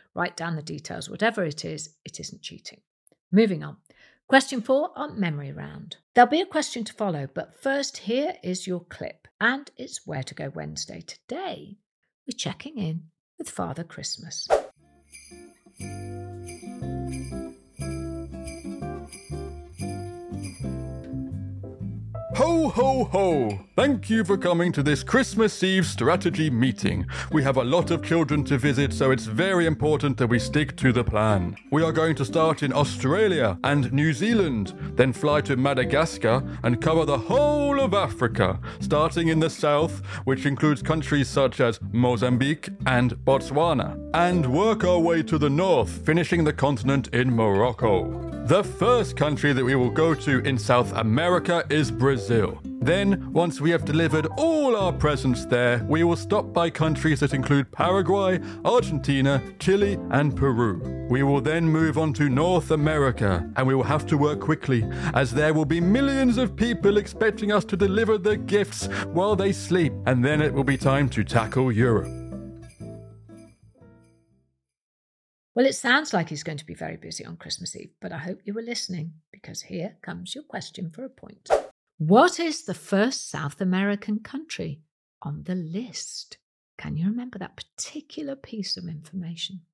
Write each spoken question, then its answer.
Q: What is the first South American country on the list?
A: The answer is Brazil.